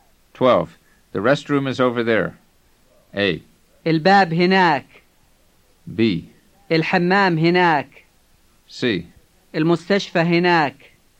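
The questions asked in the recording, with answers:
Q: The restroom is over there.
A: B: الحمام هناك.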